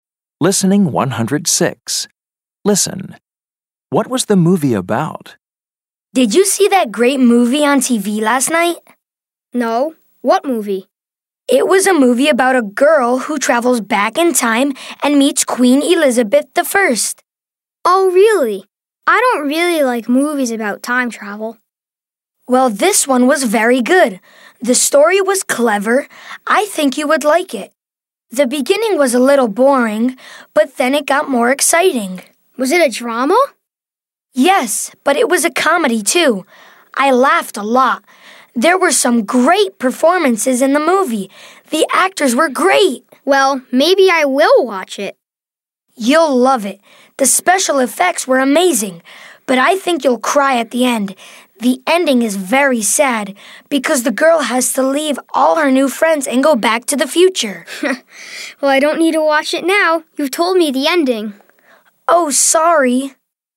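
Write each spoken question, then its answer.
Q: What was the movie about?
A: A girl who travels back in time and meets Queen Elizabeth I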